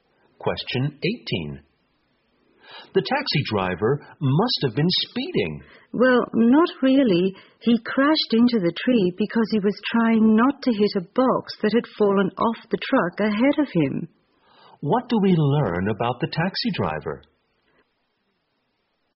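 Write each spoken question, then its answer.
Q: What do we learn about the taxi driver?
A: He wasn't speeding; he crashed into a tree trying to avoid a box that fell off a truck.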